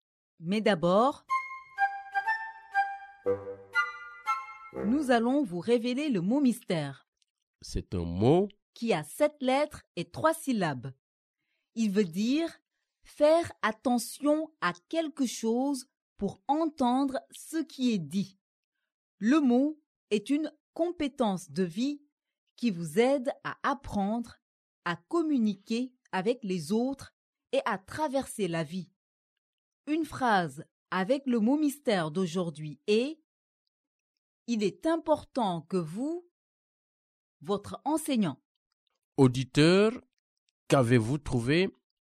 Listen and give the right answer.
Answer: Le mot mystère d'aujourd'hui est écouter.